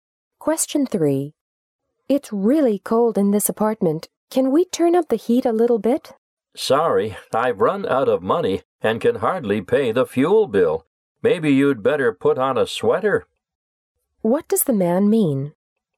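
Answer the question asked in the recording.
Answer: He can't afford more heat, so she should put on a sweater.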